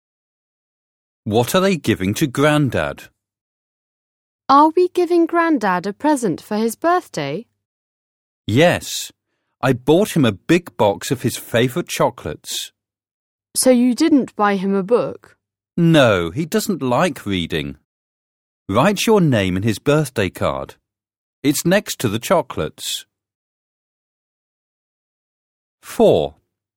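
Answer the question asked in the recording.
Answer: A big box of chocolates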